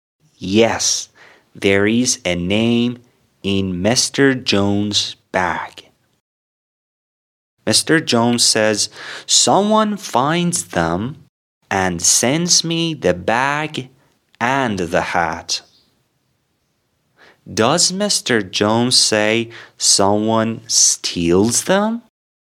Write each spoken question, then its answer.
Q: Does Mr. Jones say someone steals them?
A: No, someone finds them.